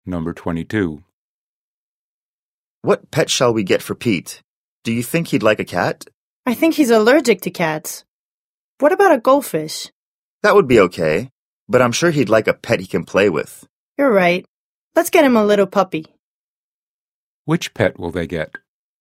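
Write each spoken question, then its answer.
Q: Which pet will they get?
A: A puppy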